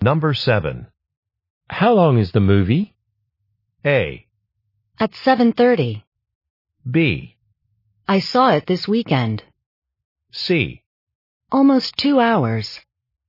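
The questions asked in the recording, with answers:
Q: How long is the movie?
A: C: Almost 2 hours.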